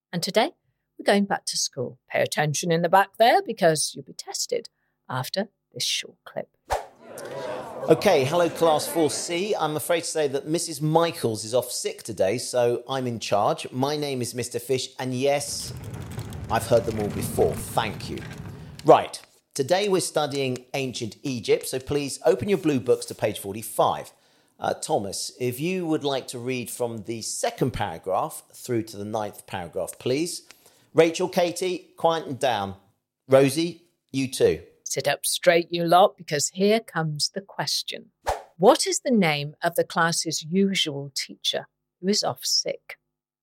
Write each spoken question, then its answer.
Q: What is the name of the class's usual teacher who is off sick?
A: And the answer is Mrs. Michaels.